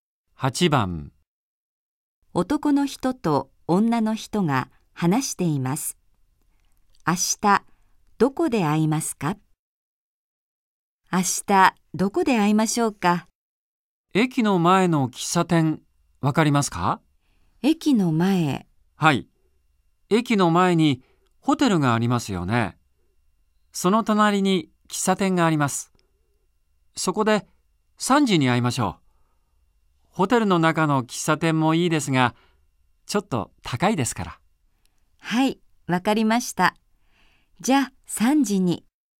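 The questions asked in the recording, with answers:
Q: 明日、どこで会いますか?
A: 駅の前のホテルの隣の喫茶店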